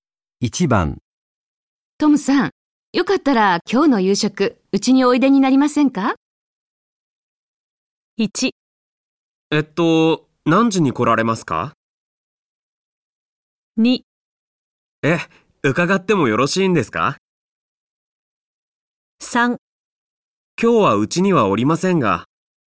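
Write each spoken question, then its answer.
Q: トムさん、よかったら今日の夕食、うちにおいでになりませんか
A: 2: え、伺ってもよろしいんですか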